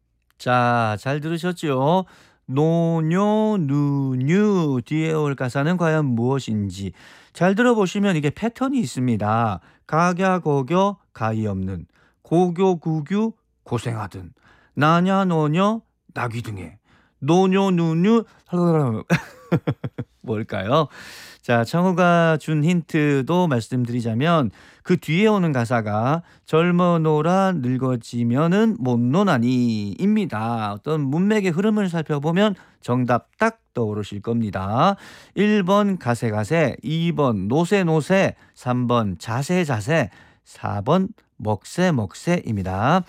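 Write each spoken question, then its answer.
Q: 노뇨 누뉴 뭘까요?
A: 2: 노세노세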